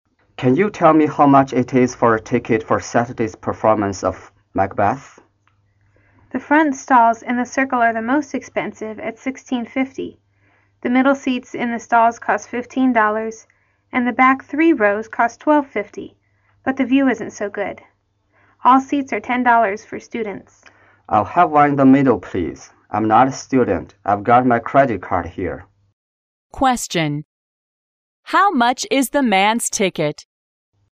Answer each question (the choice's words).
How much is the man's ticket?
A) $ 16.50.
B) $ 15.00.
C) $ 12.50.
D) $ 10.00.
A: $ 15.00.

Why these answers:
由男士所说最后一句话可知他卖的中间位置的票,价格$15。

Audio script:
M: Can you tell me how much it is for a ticket for Saturday's performance of Macbeth?
W: The front stalls and the circle are the most expensive at $16.50. The middle seats in the stalls cost $15 and the back three rows cost $12.50, but the view isn't so good. All seats are $10 for students.
M: I'll have one in the middle, please. I'm not a student. I've got my credit card here.
Question: How much is the man's ticket?